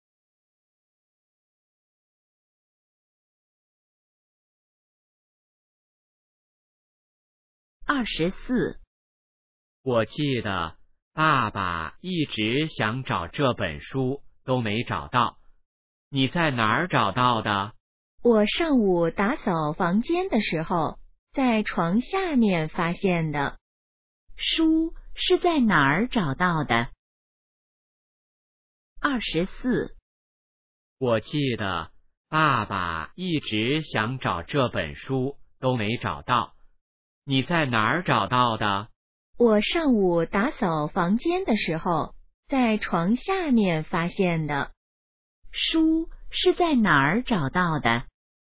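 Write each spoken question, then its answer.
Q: 书是在哪儿找到的?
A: 床下面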